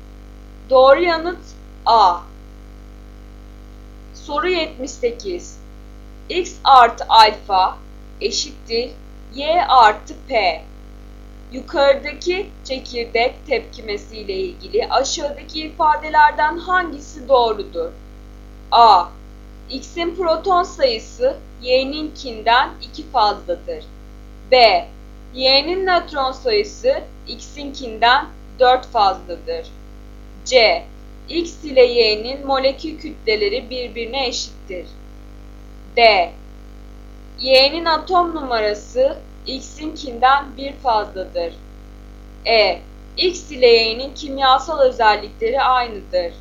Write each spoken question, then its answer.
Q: Yukarıdaki çekirdek tepkimesi ile ilgili aşağıdaki ifadelerden hangisi doğrudur?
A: Doğru yanıt D.